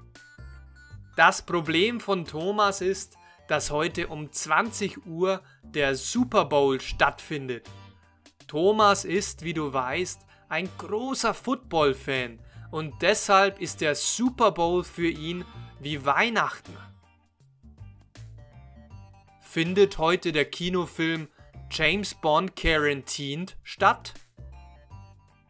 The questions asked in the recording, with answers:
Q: Findet heute der Kinofilm James Bond Quarantined statt?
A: Nein, heute findet nicht der Kinofilm James Bond Quarantine statt, sondern der Super Bowl.